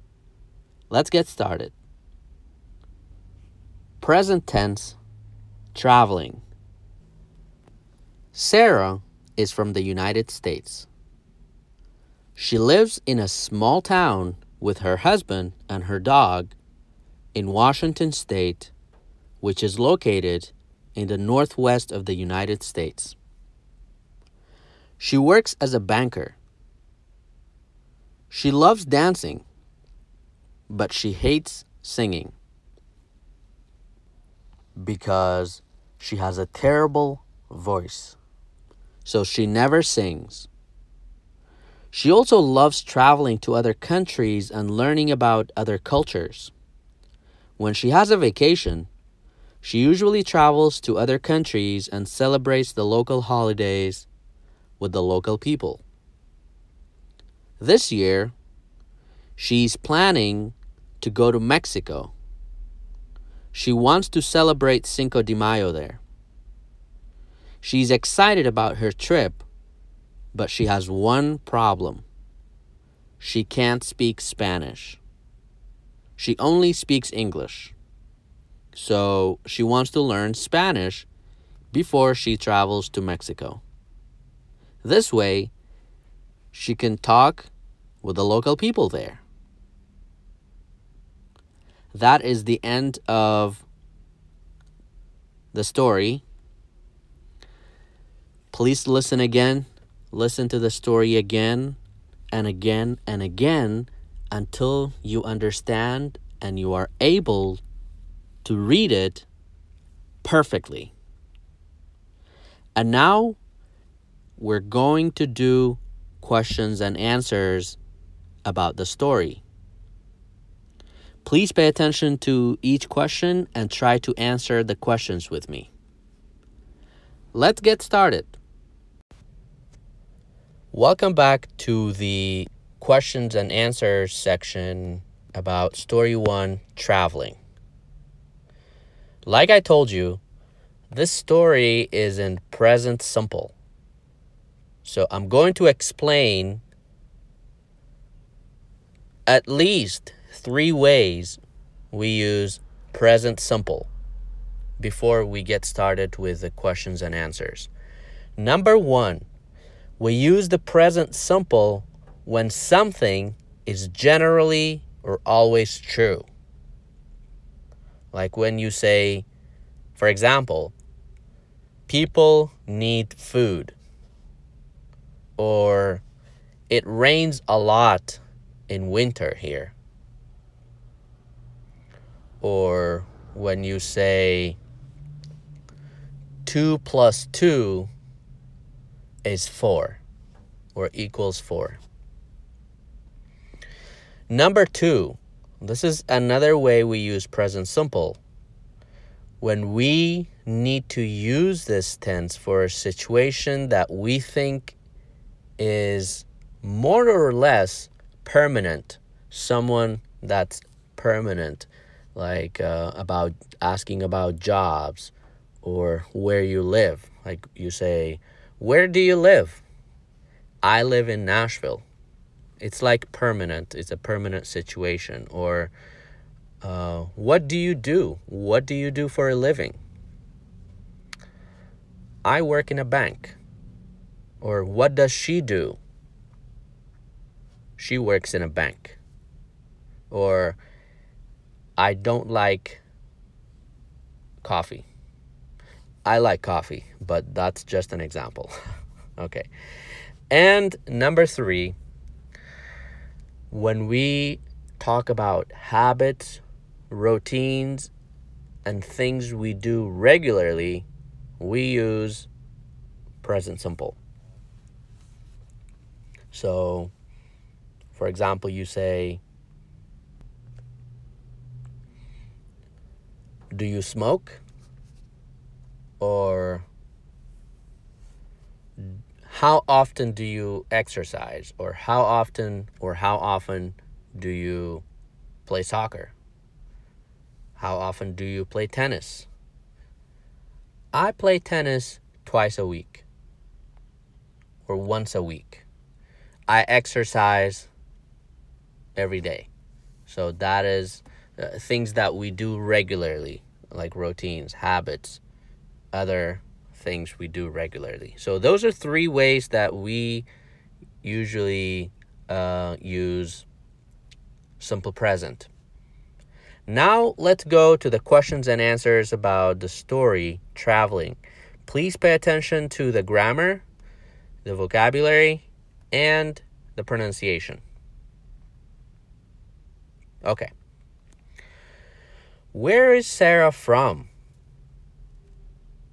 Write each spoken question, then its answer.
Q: Where is Sarah from?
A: She is from the United States.